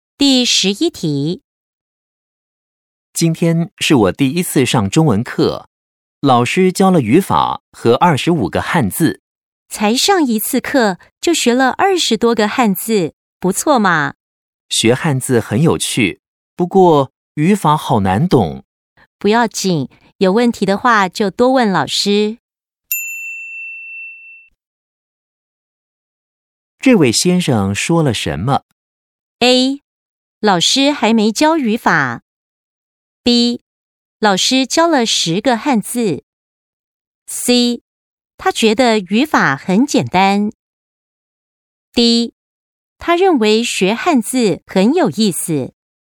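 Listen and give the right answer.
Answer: D: 他认为学汉字很有意思。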